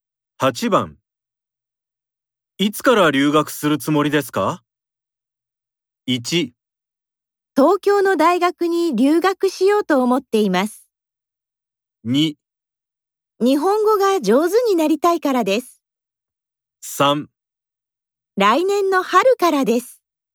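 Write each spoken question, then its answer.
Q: いつから留学するつもりですか ?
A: 3: 来年の春からです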